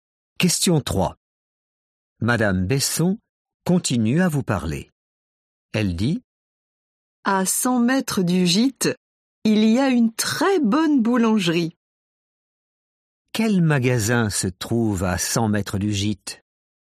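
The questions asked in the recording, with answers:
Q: Quel magasin se trouve à 100 mètres du gîte?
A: une boulangerie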